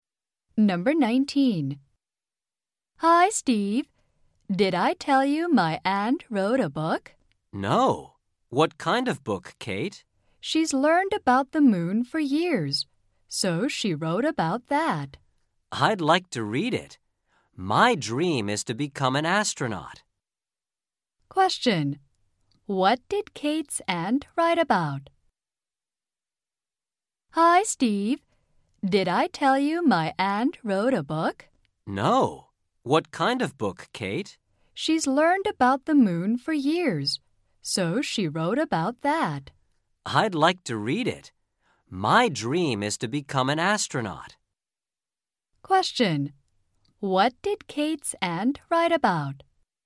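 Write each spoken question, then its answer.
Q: What did Kate's aunt write about?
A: The moon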